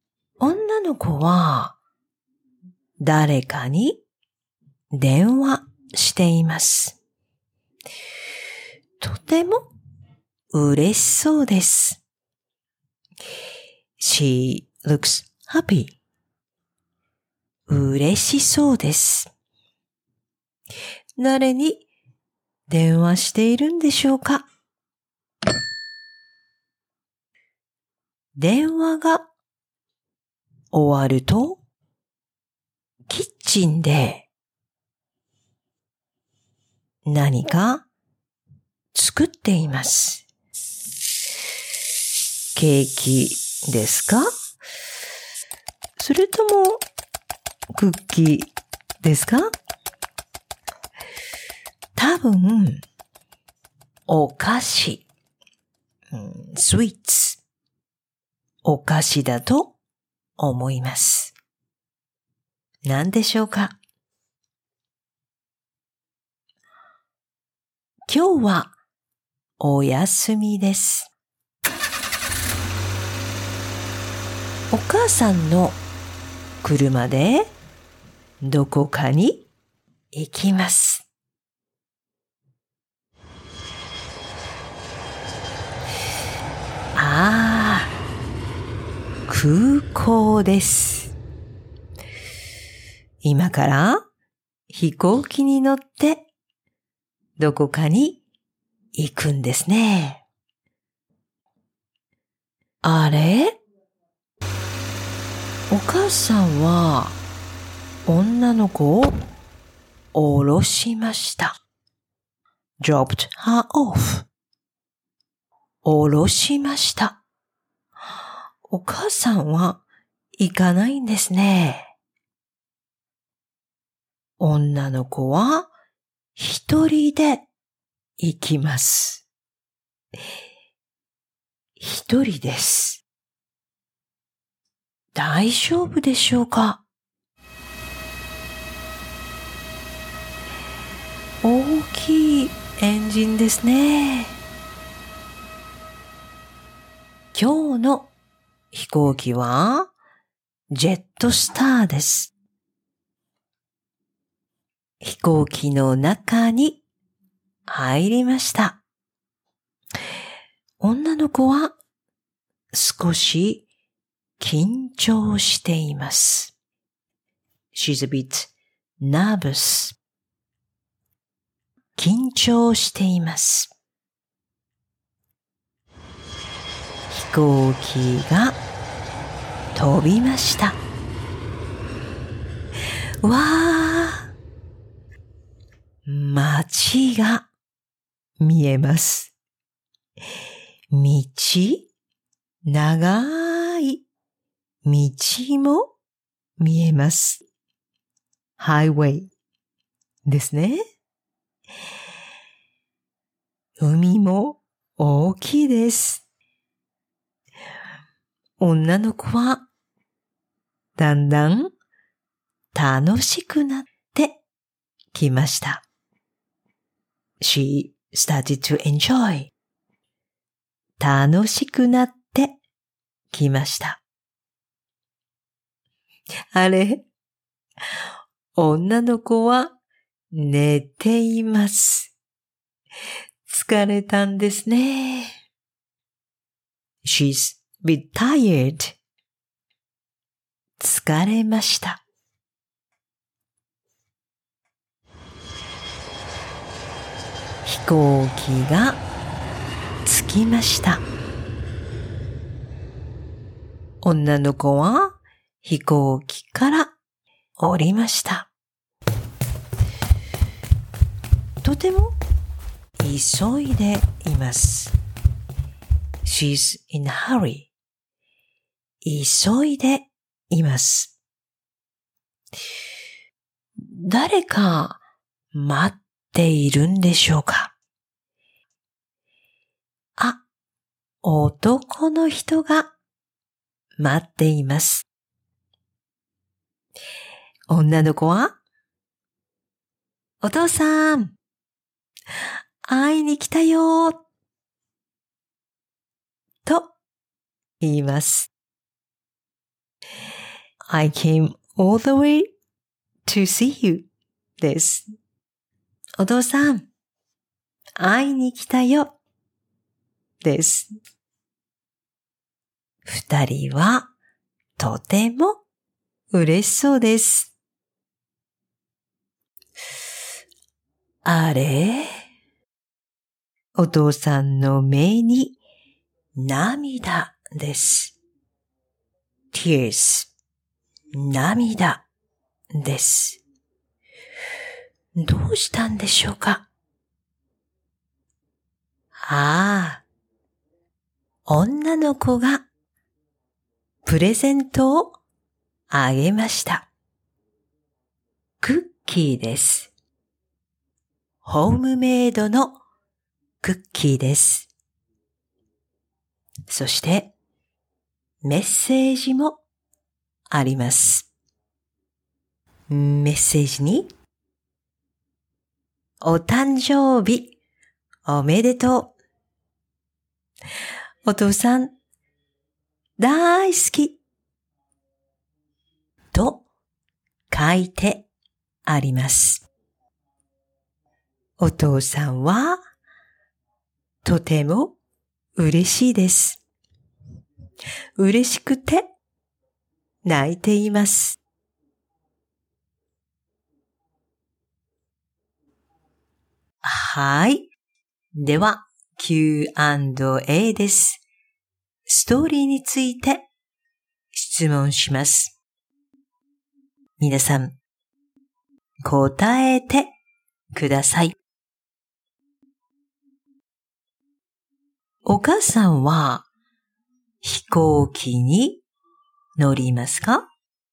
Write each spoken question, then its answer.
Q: お母さんは飛行機に乗りますか?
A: いいえ、乗りません。